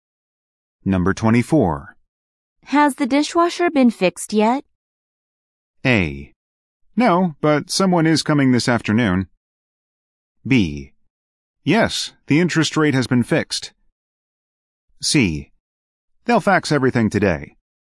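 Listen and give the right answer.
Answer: A: No, but someone is coming this afternoon.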